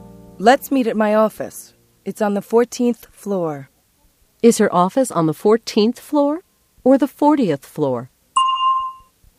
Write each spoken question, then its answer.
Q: Is her office on the 14th floor or the 40th floor?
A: It's on the 14th floor. 14.